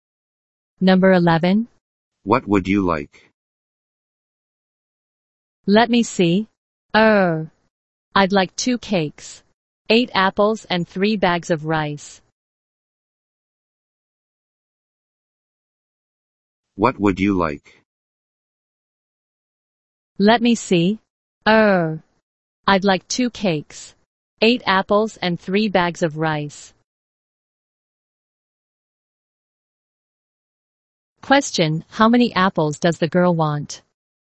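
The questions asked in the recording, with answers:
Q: Question, how many apples does the girl want?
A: Eight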